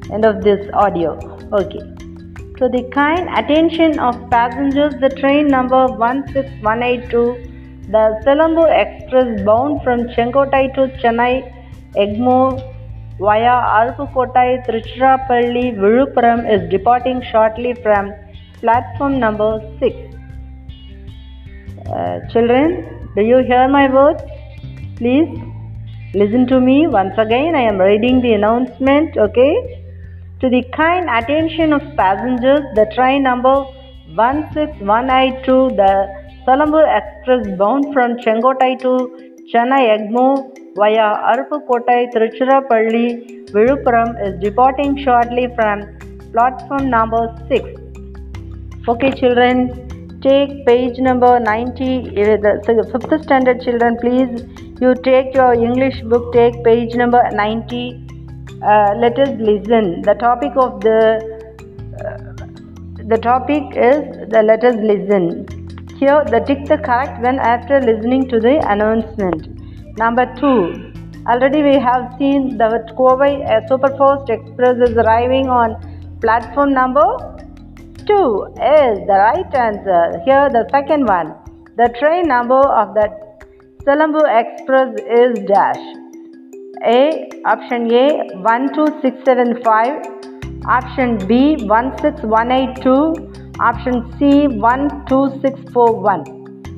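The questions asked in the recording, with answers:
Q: The train number of the Selangor Express is dash.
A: B: 16182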